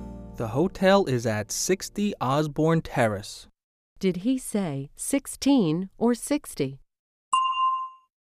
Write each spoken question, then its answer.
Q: Did he say 16 or 60?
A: He said 60. 60.